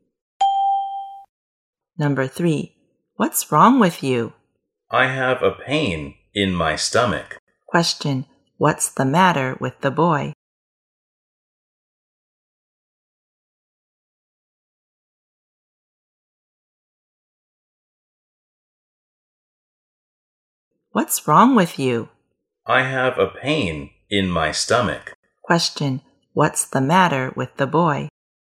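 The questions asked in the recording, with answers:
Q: what's the matter with the boy?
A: He has a stomachache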